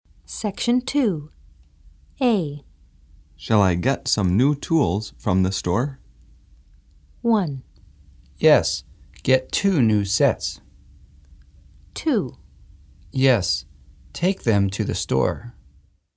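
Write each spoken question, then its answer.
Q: Shall I get some new tools from the store?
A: 1: Yes, get 2 new sets.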